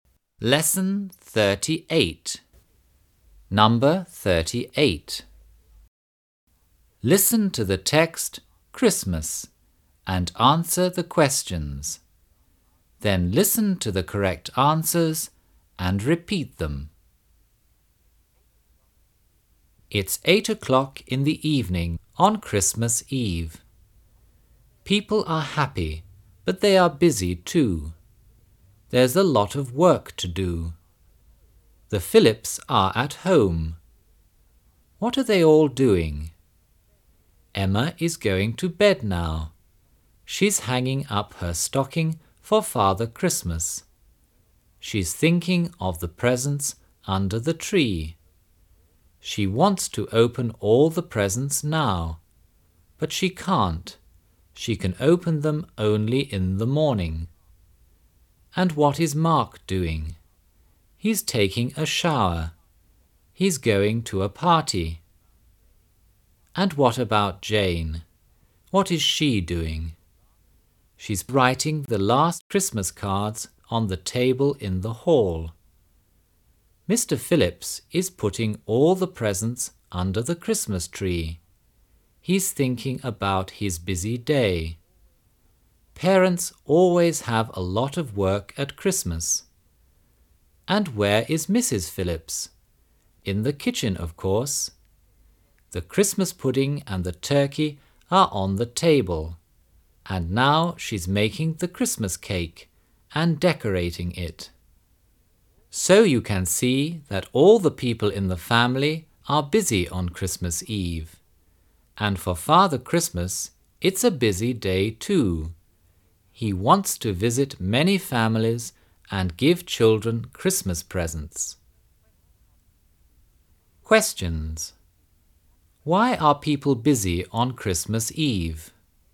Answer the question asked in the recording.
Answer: They have a lot of work to do.